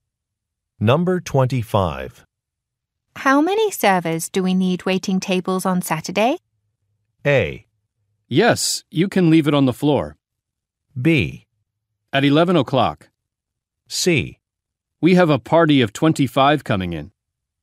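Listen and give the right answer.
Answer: C: We have a party of 25 coming in.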